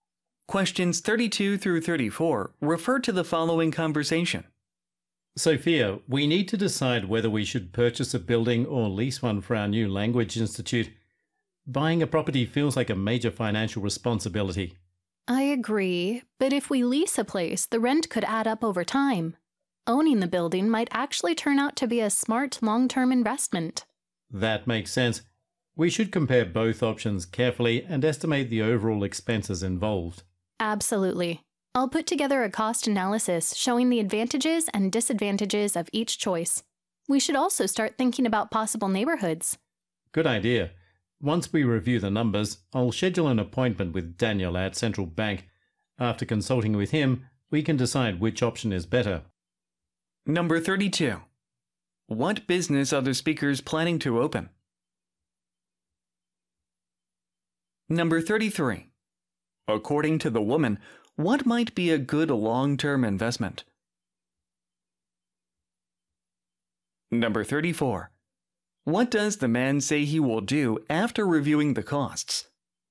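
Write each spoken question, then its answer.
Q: What business are the speakers planning to open?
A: A language institute

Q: According to the woman, what might be a good long-term investment?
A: Owning (buying) the building

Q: What does the man say he will do after reviewing the costs?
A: Schedule an appointment with Daniel at Central Bank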